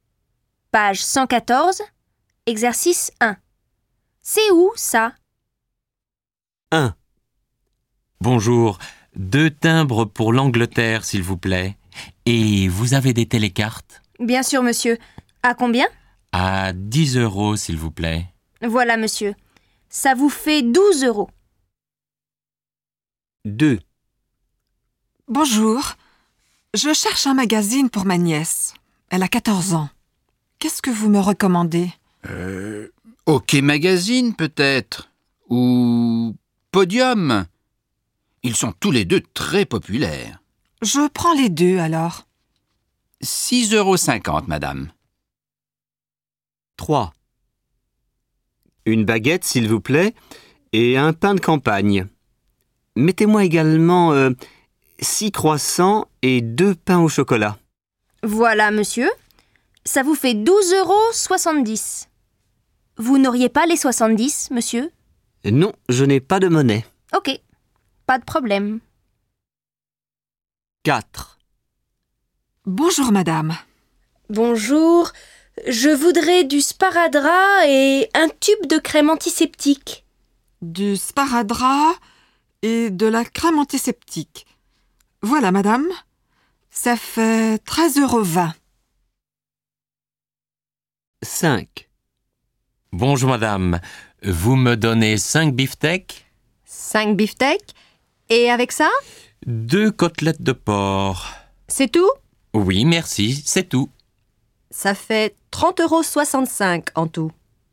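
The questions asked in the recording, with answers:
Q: C'est où, ça?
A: chez le marchand de journaux

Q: C'est où, ça?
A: à la boulangerie

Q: C'est où, ça?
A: à la pharmacie

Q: C'est où, ça?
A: à la boucherie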